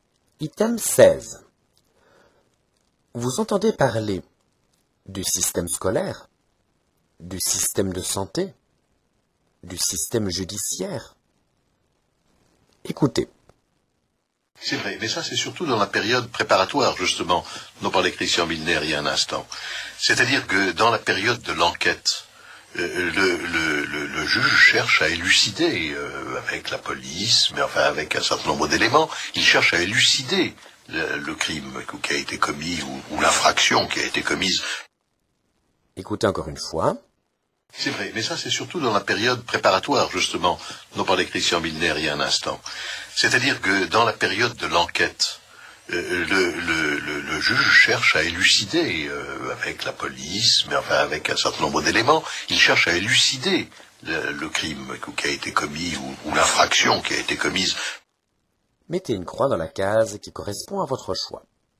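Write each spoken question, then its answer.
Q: Vous entendez parler du système scolaire, du système de santé, du système judiciaire.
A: du système judiciaire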